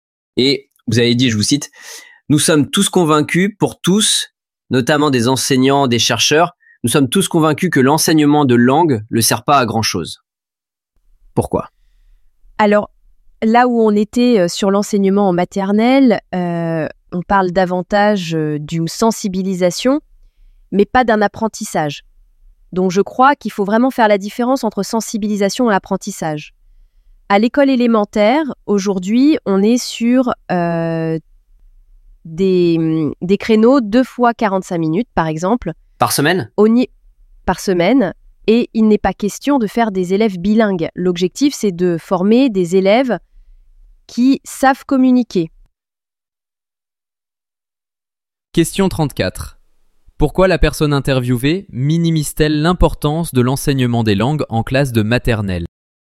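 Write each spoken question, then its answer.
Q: Pourquoi la personne interviewée minimise-t-elle l'importance de l'enseignement des langues en classe de maternelle ?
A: Parce qu'en maternelle, il s'agit d'une sensibilisation aux langues et non d'un véritable apprentissage.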